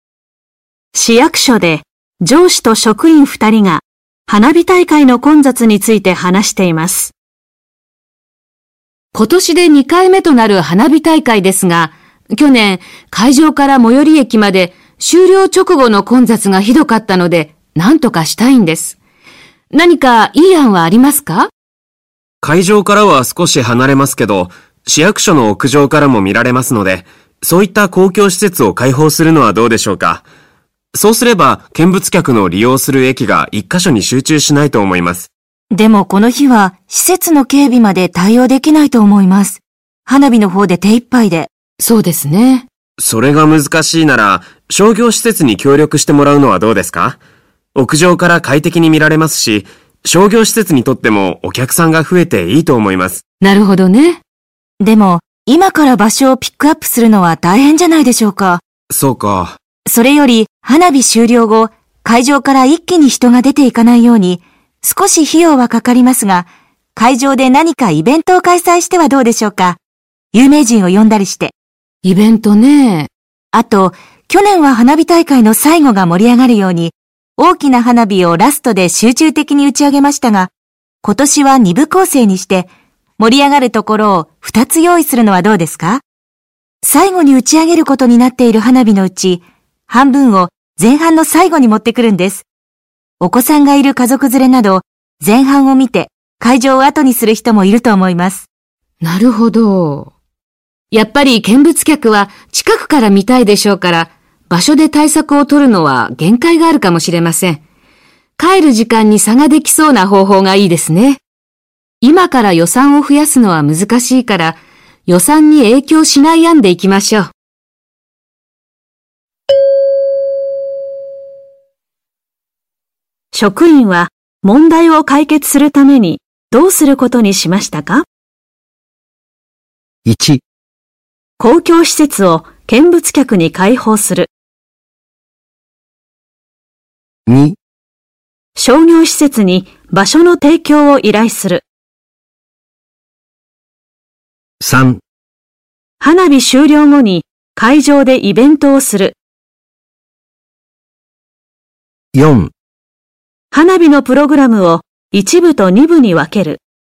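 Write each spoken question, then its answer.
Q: 職員は問題を解決するためにどうすることにしましたか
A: 4: 花火のプログラムを一部と二部に分ける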